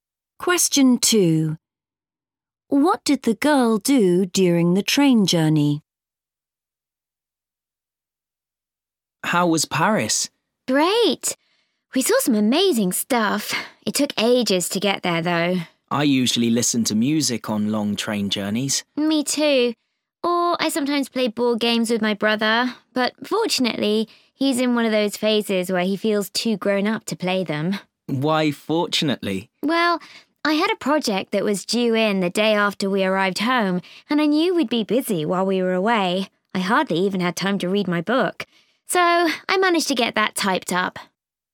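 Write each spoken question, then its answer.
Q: What did the girl do during the train journey?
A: She typed up her project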